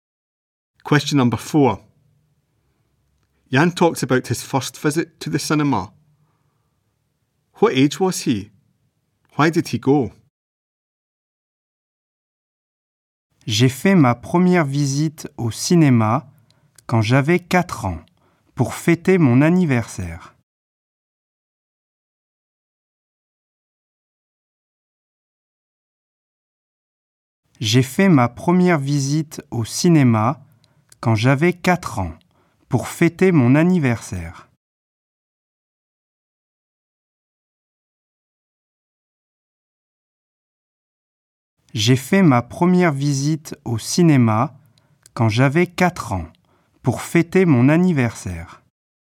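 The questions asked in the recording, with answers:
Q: Why did he go?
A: To celebrate his birthday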